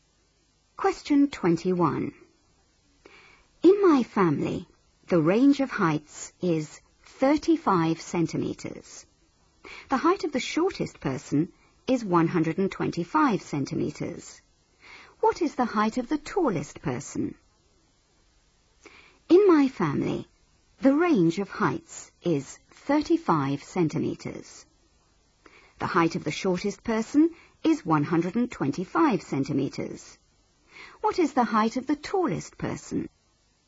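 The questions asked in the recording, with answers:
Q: What is the height of the tallest person?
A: 160 centimetres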